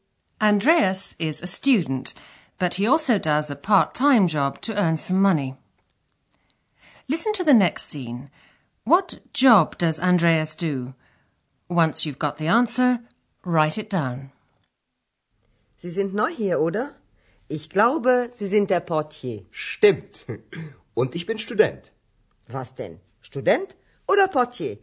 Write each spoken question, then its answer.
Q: What job does Andreas do?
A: He works as a porter. In German, portier.